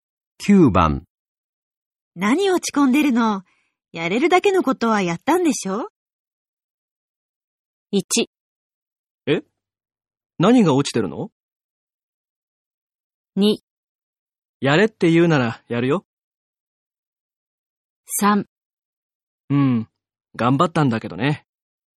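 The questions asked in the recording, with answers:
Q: 何落ち込んでるの?やれるだけのことはやったんでしょ?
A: 3: うん、頑張ったんだけどね。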